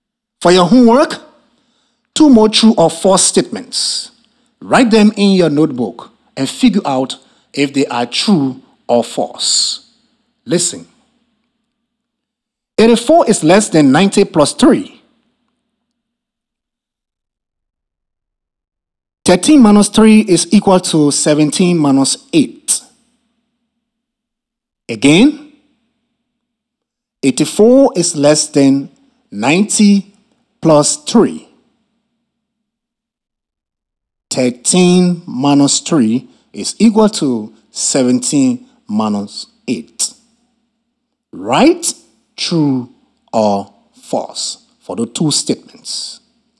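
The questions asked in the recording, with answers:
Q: Again, 84 is less than 90 plus 3.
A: True

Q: 13 minus 3 is equal to 17 minus 8.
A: False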